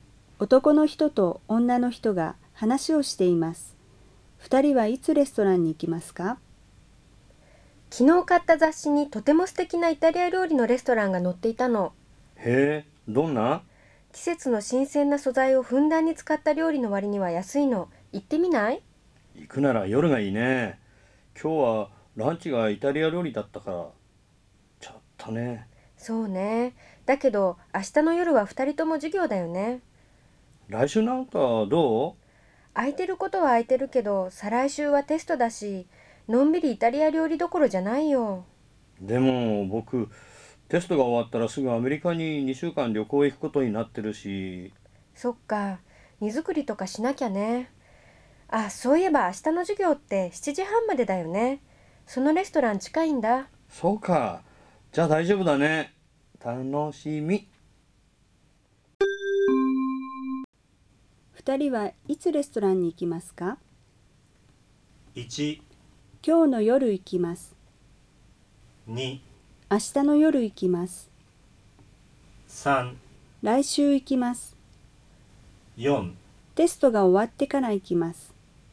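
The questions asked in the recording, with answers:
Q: 二人はいつレストランに行きますか?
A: 2: 明日の夜行きます。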